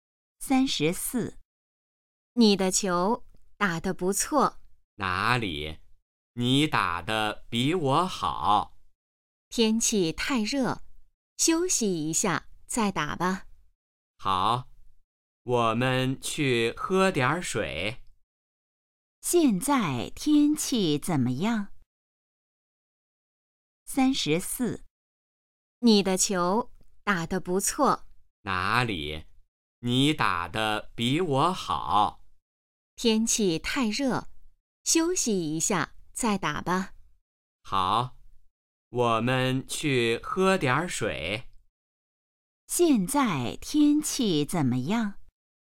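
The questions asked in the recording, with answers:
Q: 现在天气怎么样?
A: 太热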